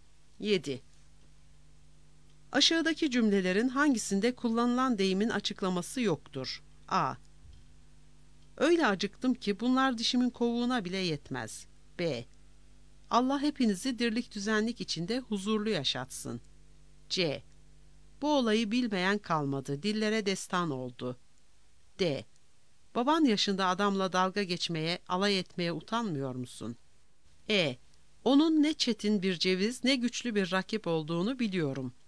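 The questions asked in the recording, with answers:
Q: Aşağıdaki cümlelerin hangisinde kullanılan deyimin açıklaması yoktur?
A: A: Öyle acıktım ki bunlar dişimin kovuğuna bile yetmez.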